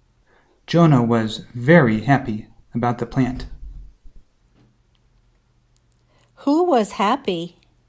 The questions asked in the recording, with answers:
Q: Who was happy?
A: Jonah was happy.